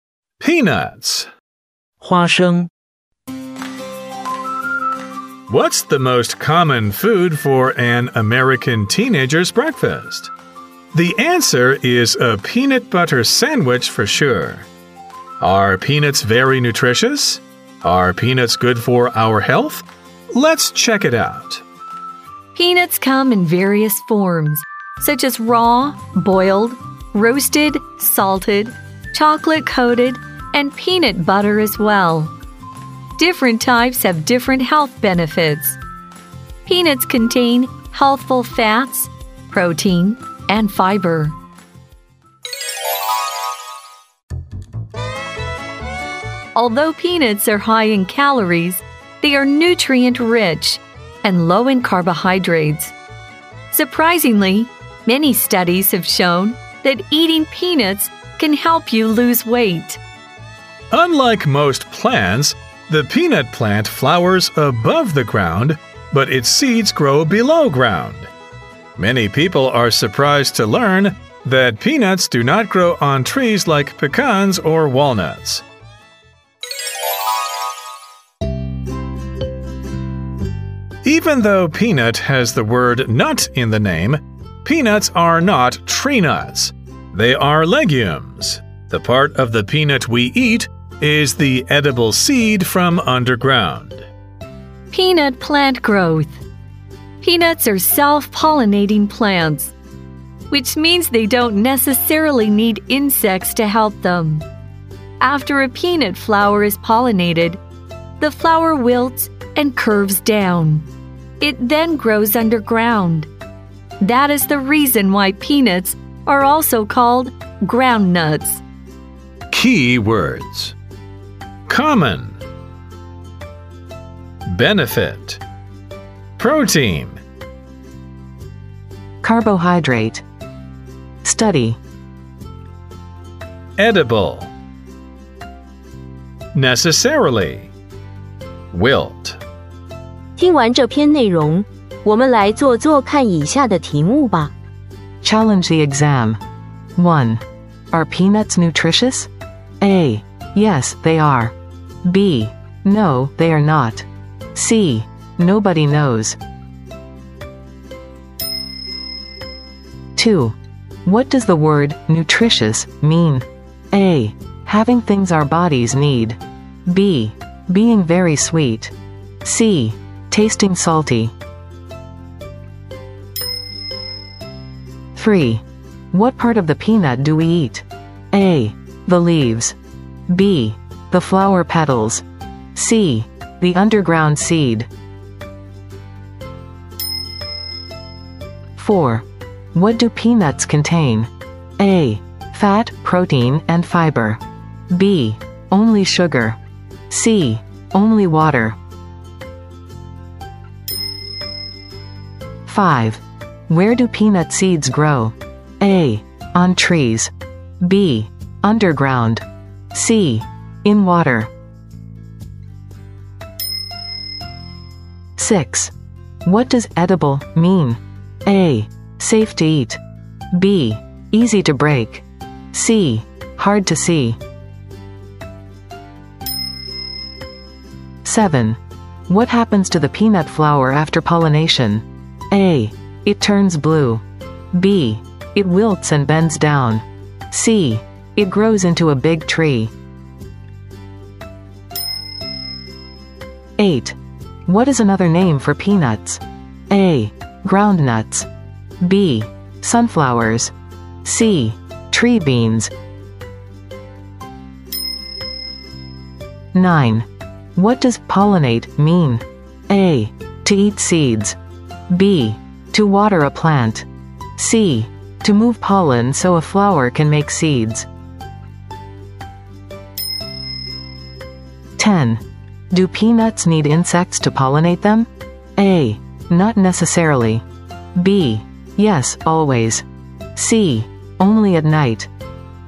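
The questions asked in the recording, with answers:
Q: Are peanuts nutritious?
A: A: Yes, they are.

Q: What does the word nutritious mean?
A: A: Having things our bodies need.

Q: What part of the peanut do we eat?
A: C: The underground seed.

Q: What do peanuts contain?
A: A: Fat, protein, and fiber.

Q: Where do peanut seeds grow?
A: B: Underground.

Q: What does edible mean?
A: A: Safe to eat.

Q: What happens to the peanut flower after pollination?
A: B: It wilts and bends down.

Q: What is another name for peanuts?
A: A: Ground nuts.

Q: Do peanuts need insects to pollinate them?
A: A: Not necessarily.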